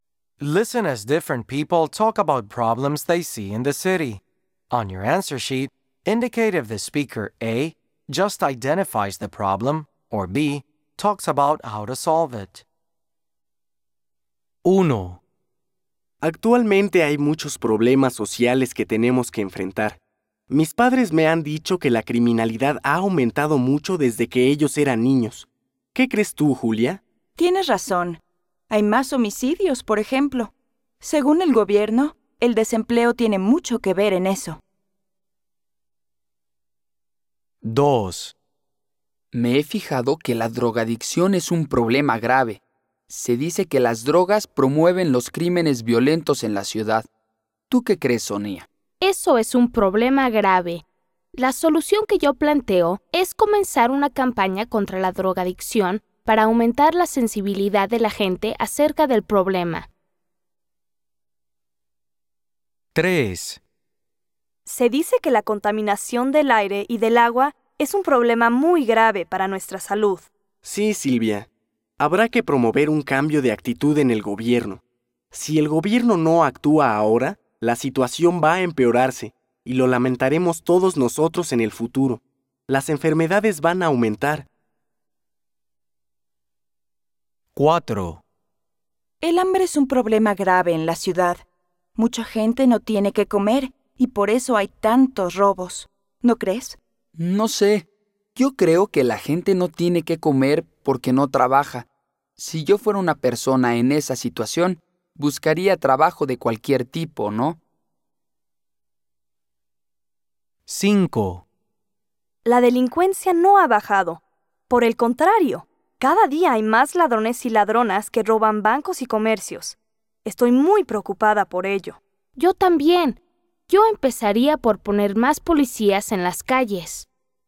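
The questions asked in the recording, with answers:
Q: On your answer sheet, indicate if the speaker A just identifies the problem, or B talks about how to solve it.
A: A: just identifies the problem

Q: On your answer sheet, indicate if the speaker A just identifies the problem, or B talks about how to solve it.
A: B: talks about how to solve it

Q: On your answer sheet, indicate if the speaker A just identifies the problem, or B talks about how to solve it.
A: B: talks about how to solve it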